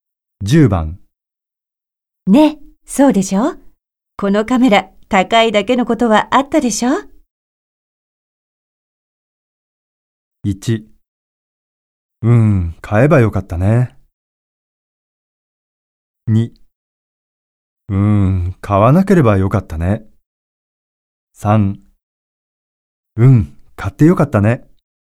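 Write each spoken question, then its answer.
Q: ね、そうでしょこのカメラ高いだけのことはあったでしょ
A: 3: うん、買ってよかったね。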